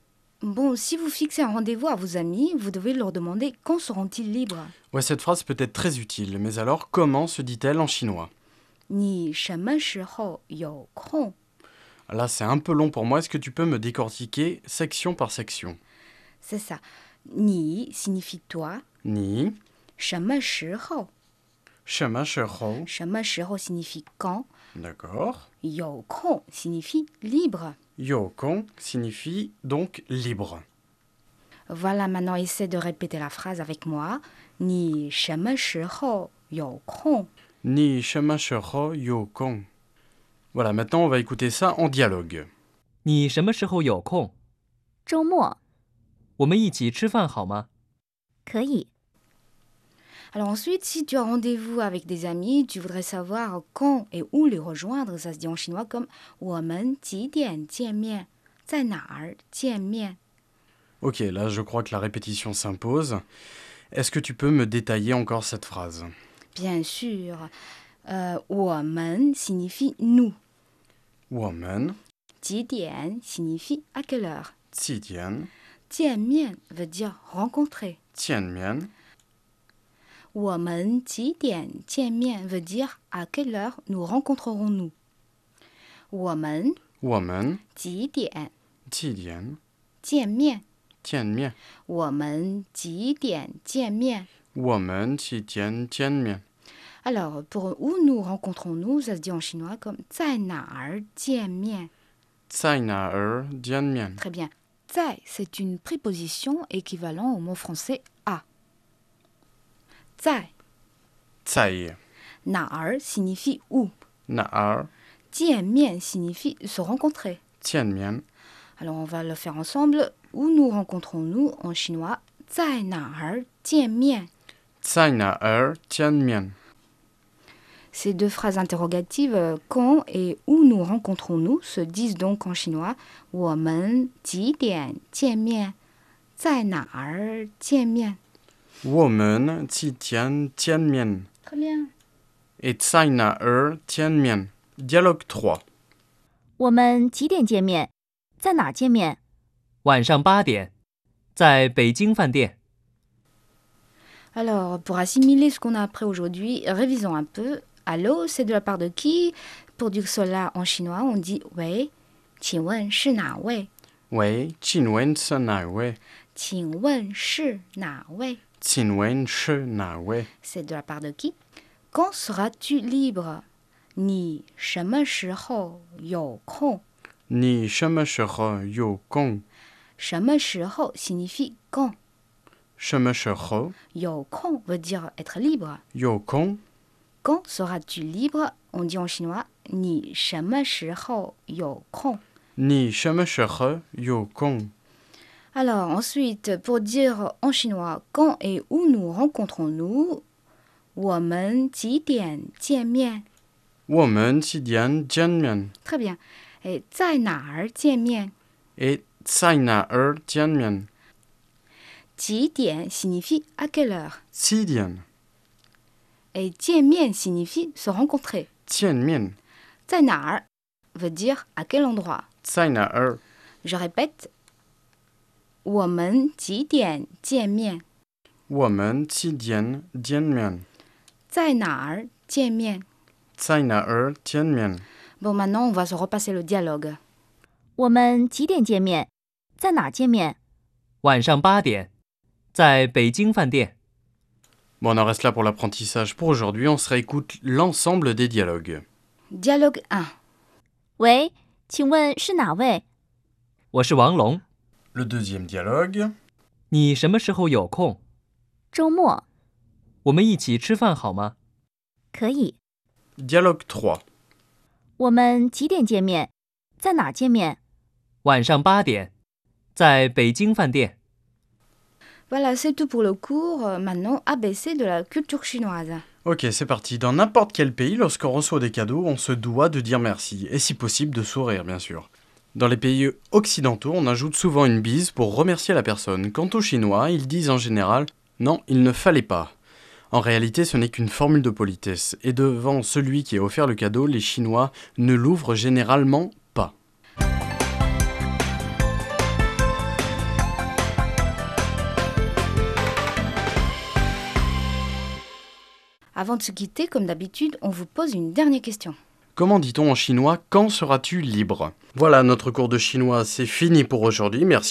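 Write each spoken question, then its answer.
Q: Comment dit-on en chinois « Quand seras-tu libre ?»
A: 你什么时候有空?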